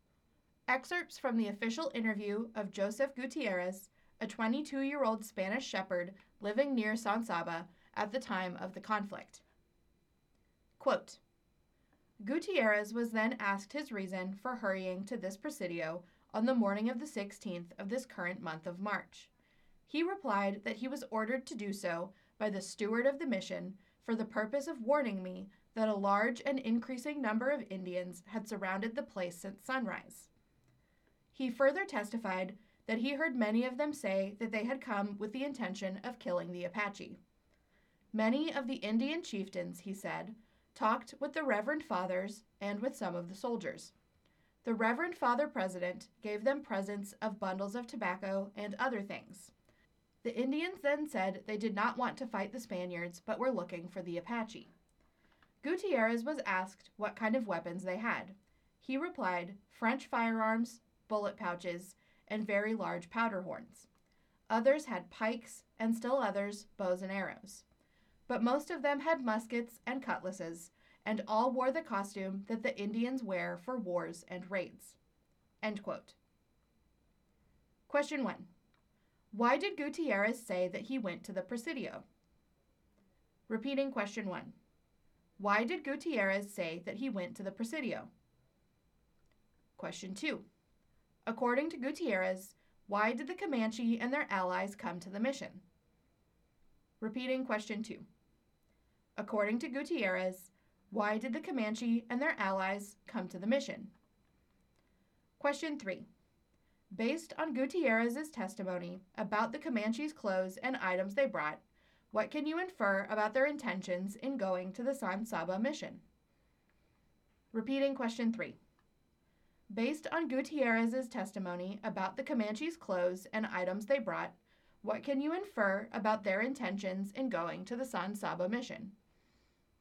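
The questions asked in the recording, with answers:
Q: Why did Gutierrez say that he went to the presidio?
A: The mission steward ordered him to warn that many Indians had surrounded the mission

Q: According to Gutierrez, why did the Comanche and their allies come to the mission?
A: To kill the Apache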